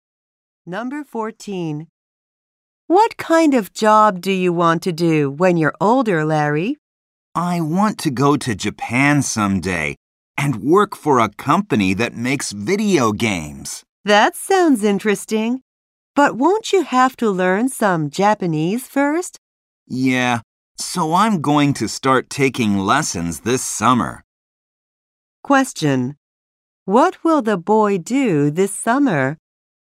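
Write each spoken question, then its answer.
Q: What will the boy do this summer?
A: Start taking Japanese lessons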